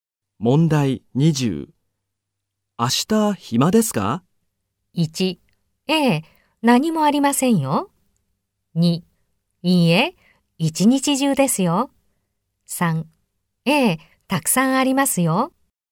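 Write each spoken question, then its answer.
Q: 明日暇ですか?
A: 3: ええ、何もありませんよ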